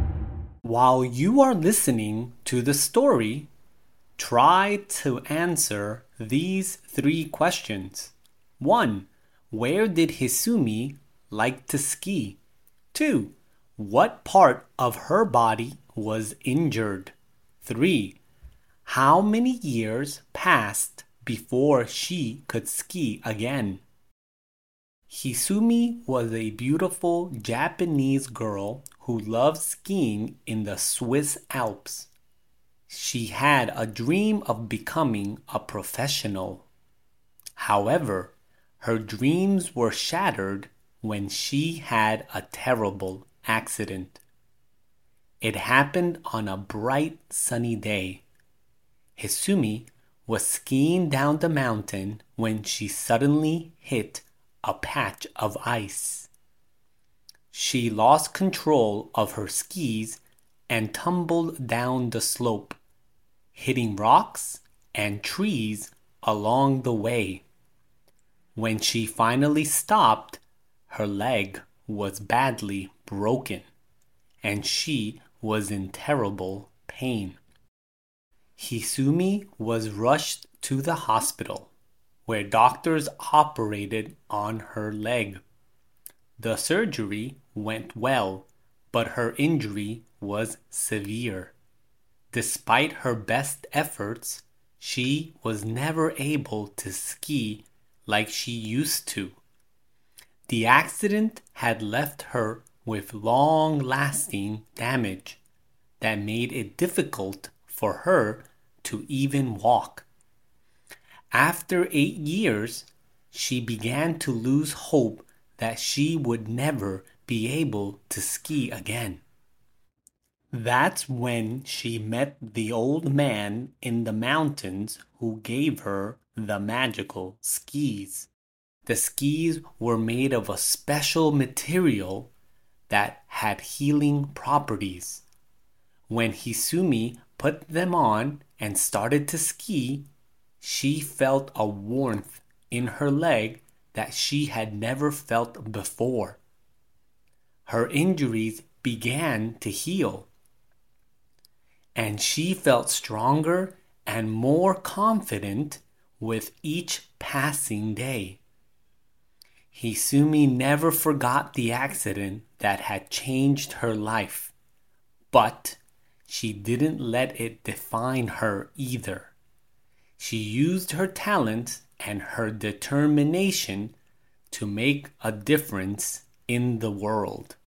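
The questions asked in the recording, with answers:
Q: Where did Hisumi like to ski?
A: In the Swiss Alps

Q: What part of her body was injured?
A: Her leg

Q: How many years passed before she could ski again?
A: 8 years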